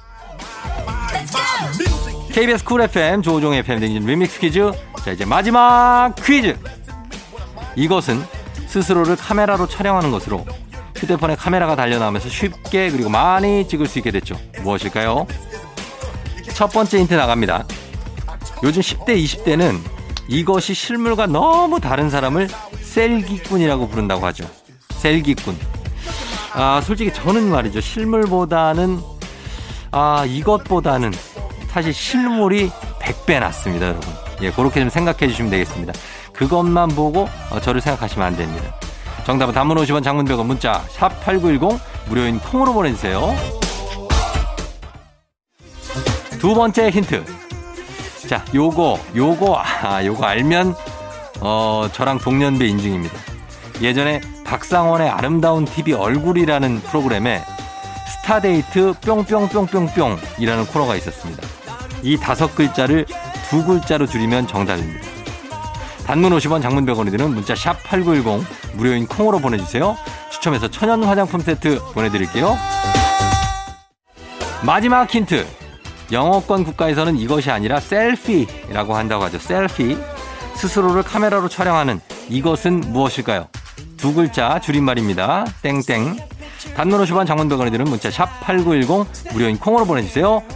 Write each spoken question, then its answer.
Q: 셀피. 스스로를 카메라로 촬영하는 이것은 무엇일까요?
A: 셀카죠 셀카.